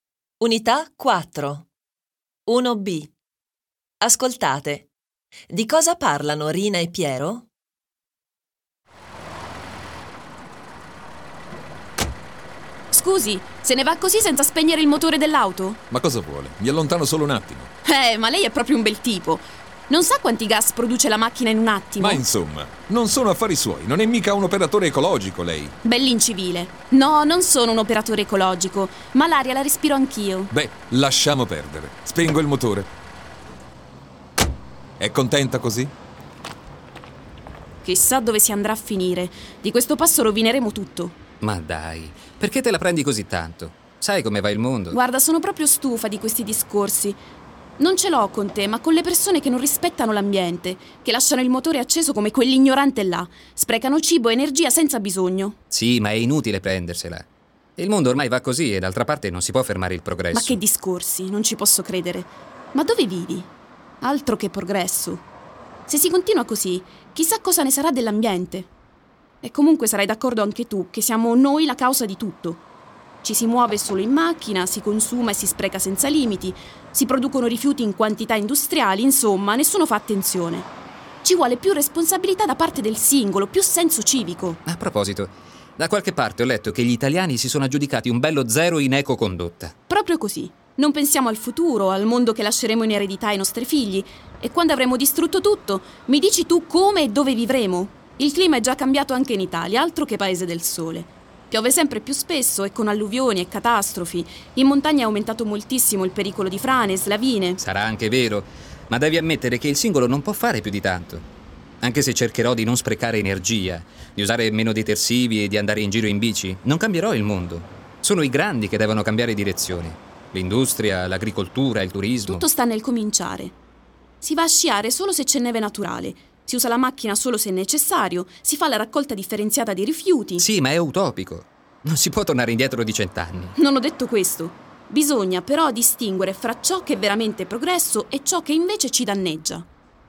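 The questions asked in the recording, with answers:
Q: Di cosa parlano Rina e Piero?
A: Dell'ambiente e di chi non lo rispetta (inquinamento, sprechi, progresso)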